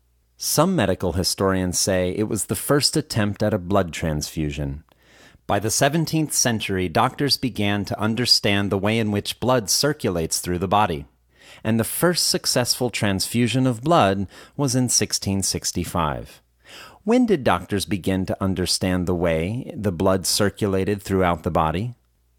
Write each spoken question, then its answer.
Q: When did doctors begin to understand the way the blood circulated throughout the body?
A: Doctors began to understand the way the blood circulated throughout the body in the 17th century.